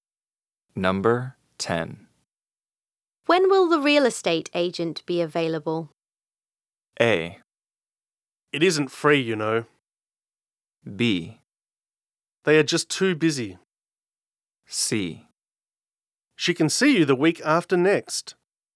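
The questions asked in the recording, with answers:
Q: When will the real estate agent be available?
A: C: She can see you the week after next.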